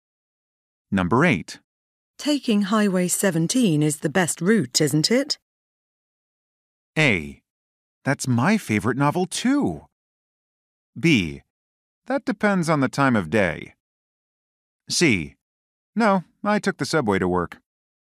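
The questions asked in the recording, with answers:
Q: Taking Highway 17 is the best route, isn't it?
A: B: That depends on the time of day.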